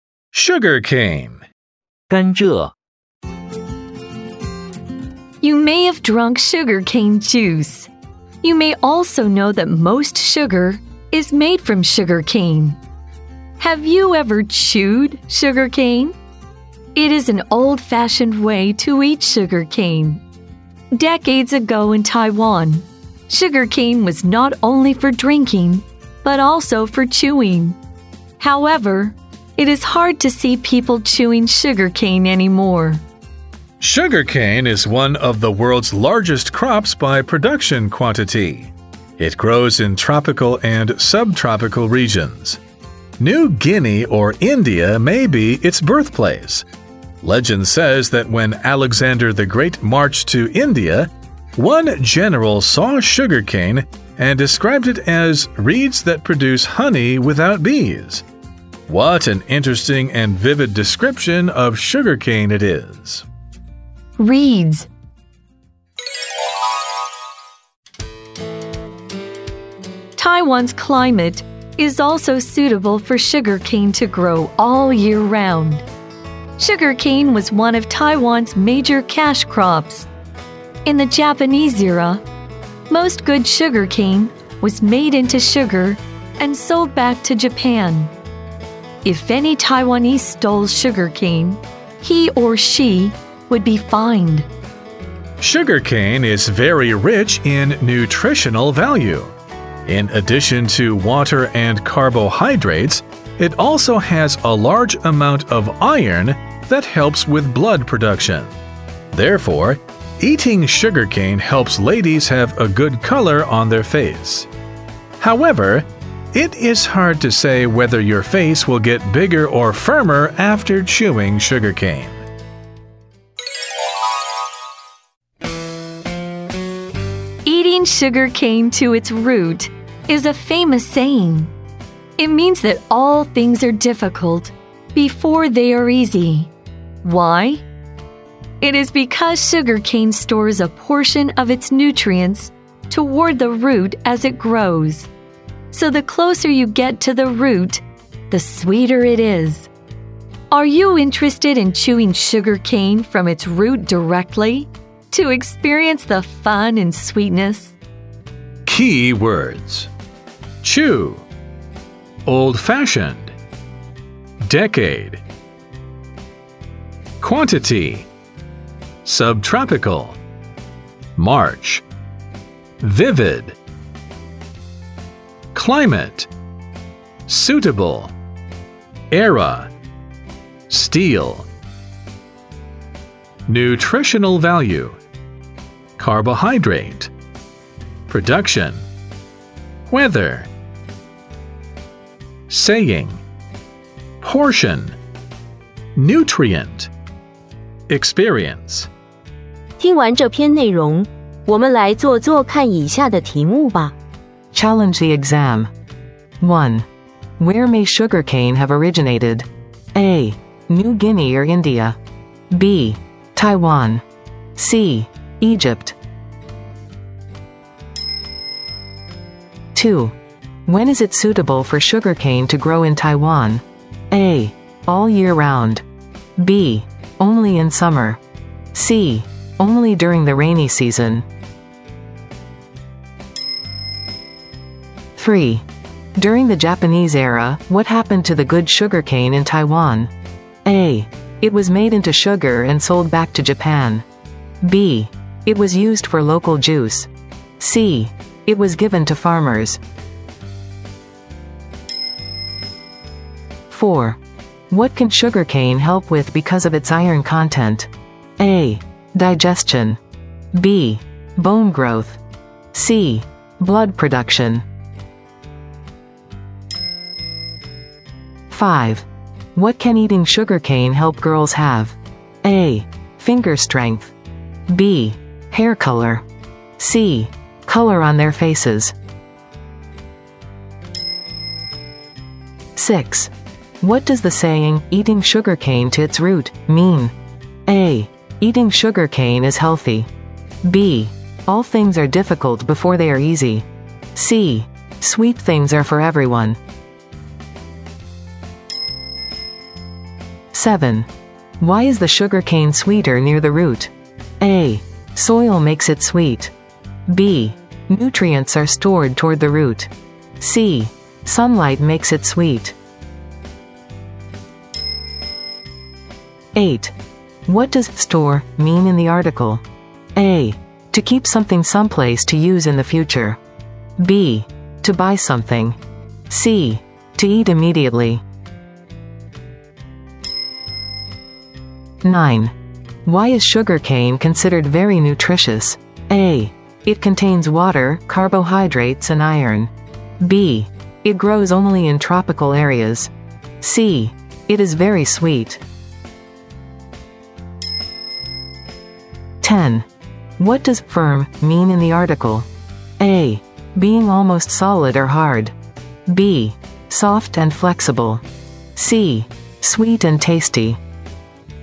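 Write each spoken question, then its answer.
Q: Where may sugar cane have originated?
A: A: New Guinea or India

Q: When is it suitable for sugar cane to grow in Taiwan?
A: A: All year round

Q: During the Japanese era, what happened to the good sugar cane in Taiwan?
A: A: It was made into sugar and sold back to Japan

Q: What can sugar cane help with because of its iron content?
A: C: Blood production

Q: What can eating sugar cane help girls have?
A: C: Color on their faces

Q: What does the saying, eating sugar cane to its root, mean?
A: B: All things are difficult before they are easy

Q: Why is the sugar cane sweeter near the root?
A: B: Nutrients are stored toward the root

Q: What does store mean in the article?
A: A: To keep something someplace to use in the future

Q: Why is sugar cane considered very nutritious?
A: A: It contains water, carbohydrates, and iron

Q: What does firm mean in the article?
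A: A: Being almost solid or hard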